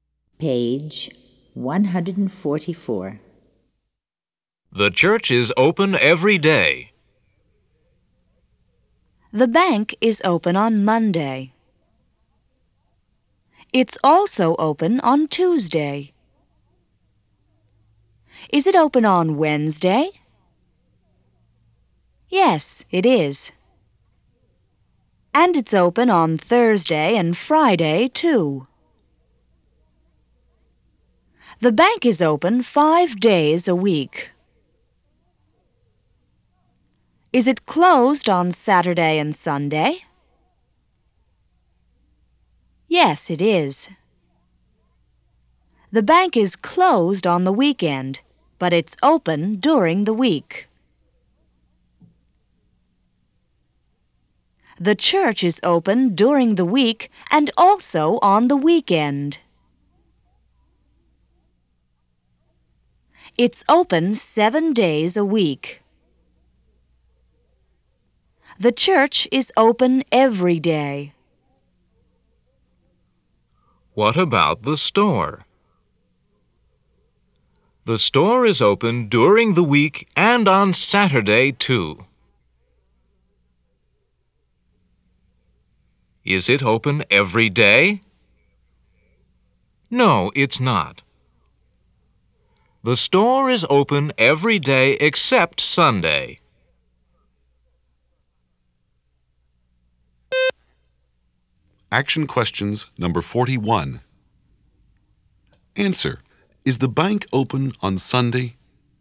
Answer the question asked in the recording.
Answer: No, it's not.